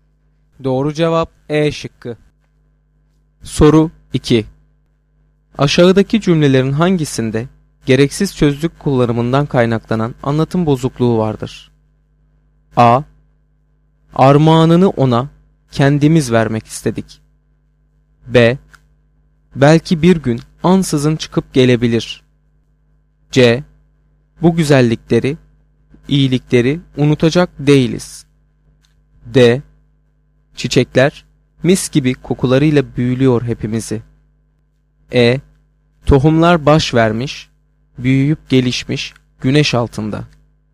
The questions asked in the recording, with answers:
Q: Aşağıdaki cümlelerin hangisinde gereksiz sözcük kullanımından kaynaklanan anlatım bozukluğu vardır?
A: Doğru cevap B şıkkı.